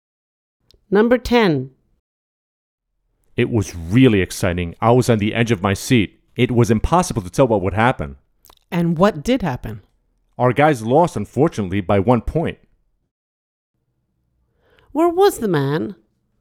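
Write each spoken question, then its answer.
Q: Where was the man?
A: at a sports game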